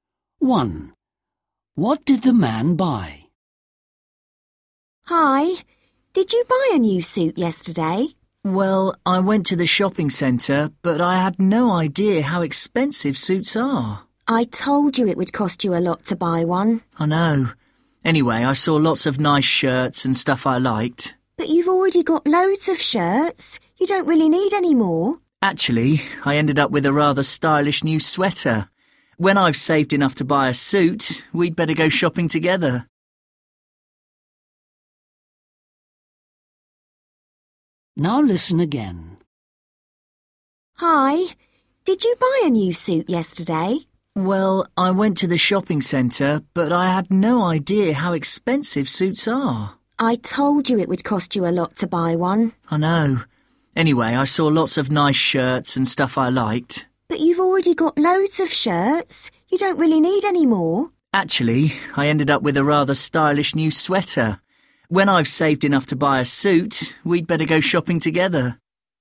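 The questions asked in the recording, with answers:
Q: What did the man buy?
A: a sweater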